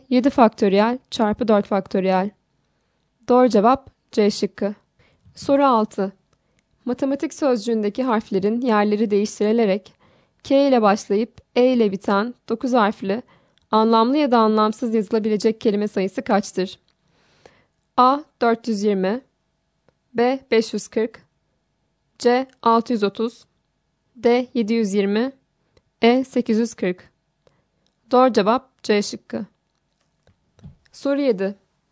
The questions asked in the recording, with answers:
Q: Matematik sözcüğündeki harflerin yerleri değiştirilerek K ile başlayıp E ile biten 9 harfli, anlamlı ya da anlamsız yazılabilecek kelime sayısı kaçtır?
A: Doğru cevap C şıkkı.